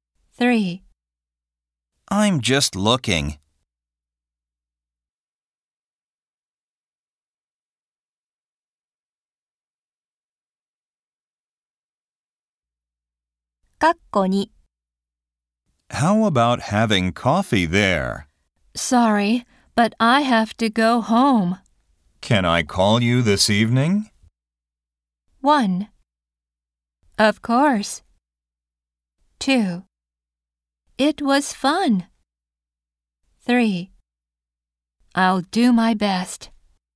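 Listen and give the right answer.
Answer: 1: Of course.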